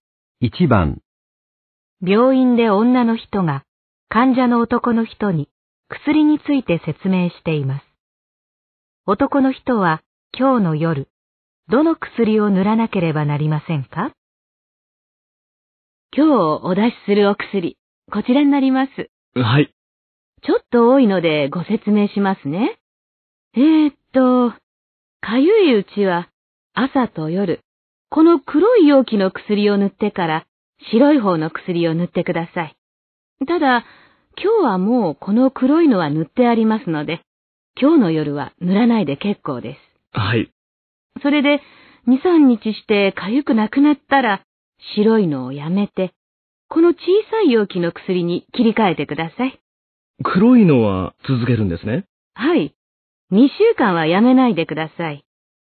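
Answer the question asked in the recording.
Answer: 白い容器の薬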